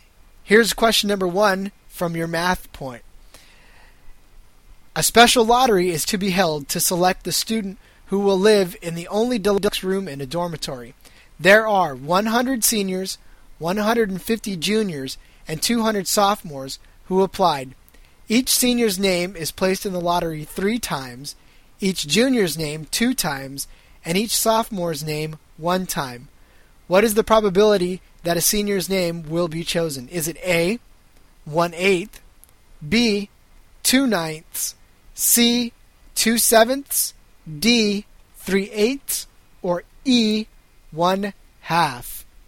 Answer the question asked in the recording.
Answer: The answer to that was D, 3/8.